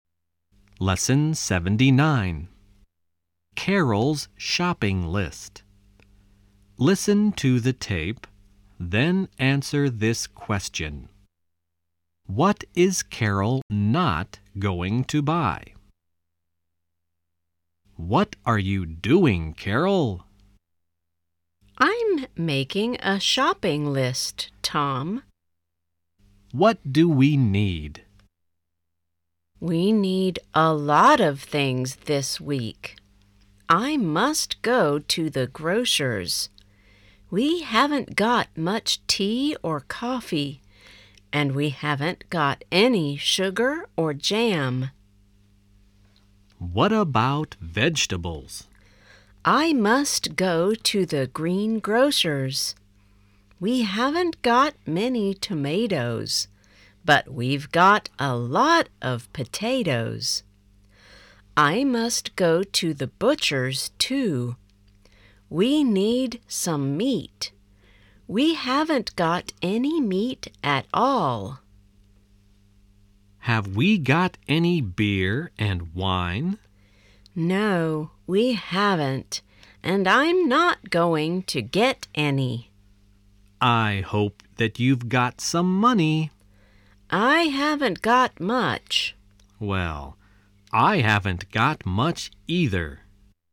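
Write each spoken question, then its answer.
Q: What is Carol not going to buy?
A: Beer and wine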